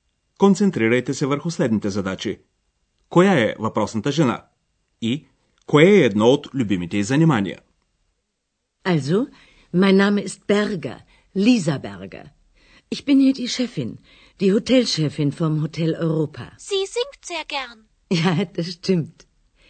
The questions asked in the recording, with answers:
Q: Коя е въпросната жена?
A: беше госпожа Бергер, управителката на Хотел Европа